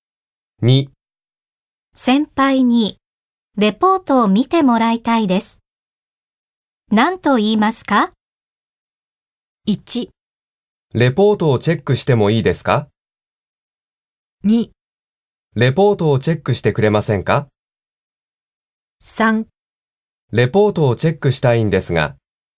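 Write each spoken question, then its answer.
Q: 先輩にレポートを見てもらいたいです。何と言いますか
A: 2: レポートをチェックしてくれませんか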